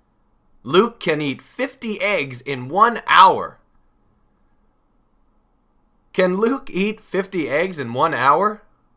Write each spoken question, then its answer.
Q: Can Luke eat 50 eggs in 1 hour?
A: Yes, he can.